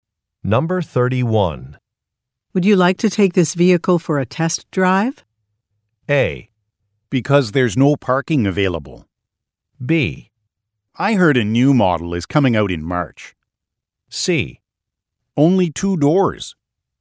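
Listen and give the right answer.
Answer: B: I heard a new model is coming out in March.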